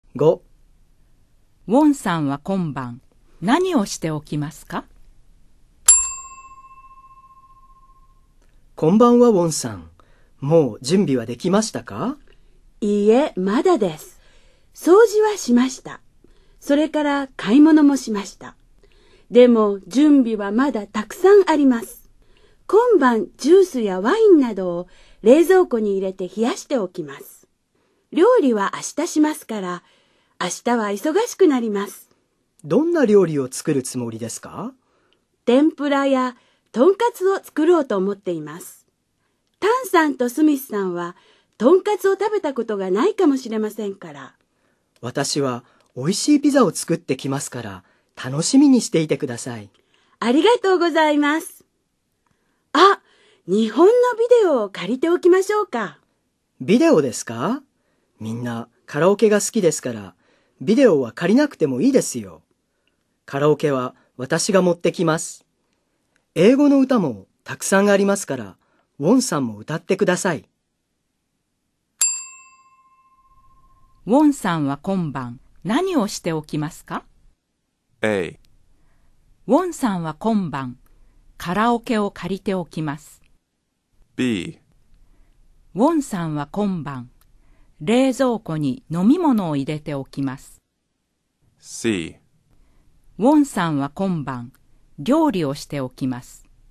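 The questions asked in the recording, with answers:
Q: ウォンさんは今晩何をしておきますか?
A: B: ウォンさんは今晩冷蔵庫に飲み物を入れておきます。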